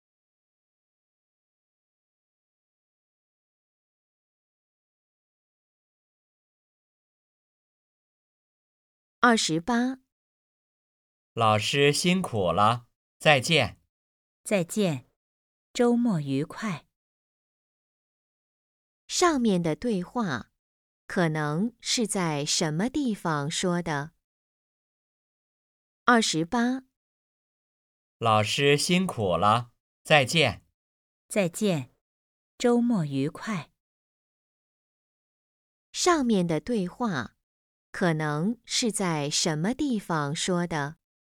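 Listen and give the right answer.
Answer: 学校(教室)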